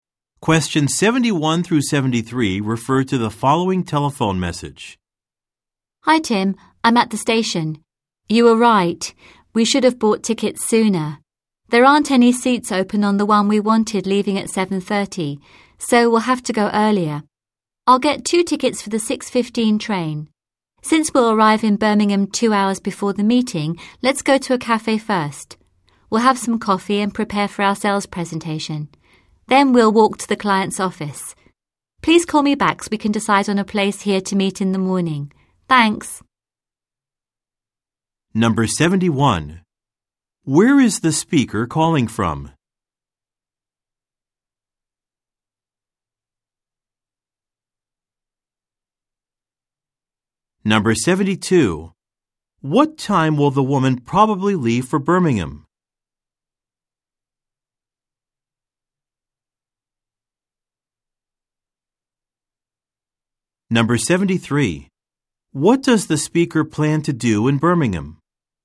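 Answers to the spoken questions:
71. A train station
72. At 6:15
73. Give a sales presentation to a client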